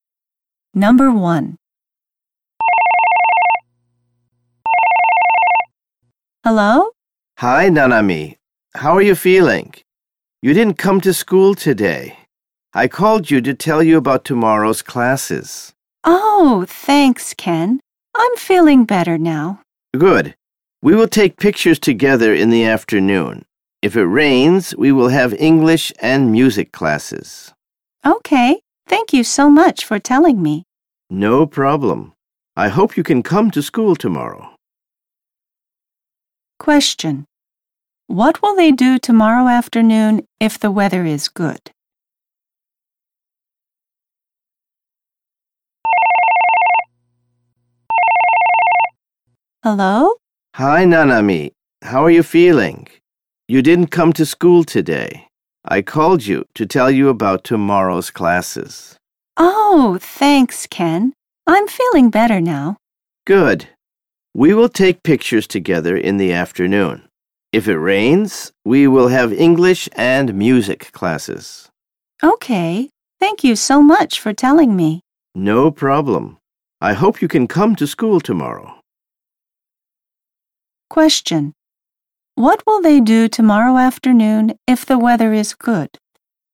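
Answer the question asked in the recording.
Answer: They will take pictures together.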